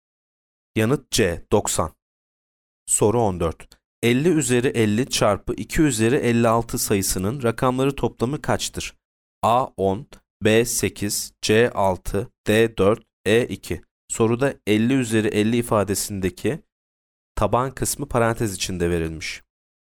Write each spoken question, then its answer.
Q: 50 üzeri 50 çarpı 2 üzeri 56 sayısının rakamları toplamı kaçtır?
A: Yanıt A 10.